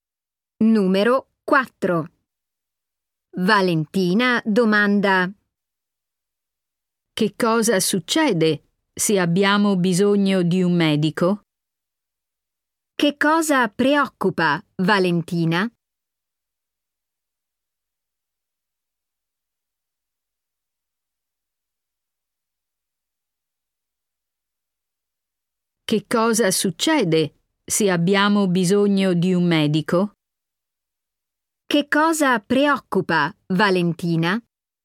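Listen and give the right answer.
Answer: Se hanno bisogno di un medico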